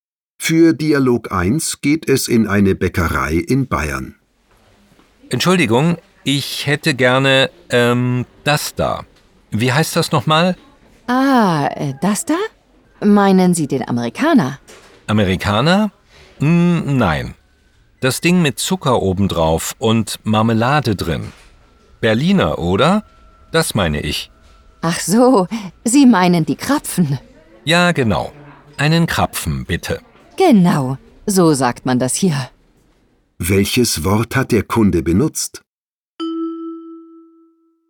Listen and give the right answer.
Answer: Das Ding mit Zucker obendrauf.